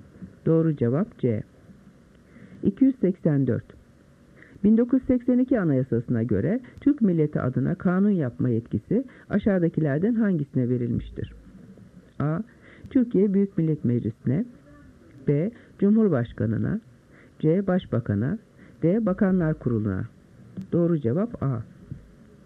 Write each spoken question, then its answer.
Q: 1982 Anayasası'na göre Türk Milleti adına kanun yapma yetkisi aşağıdakilerden hangisine verilmiştir?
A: Doğru cevap A.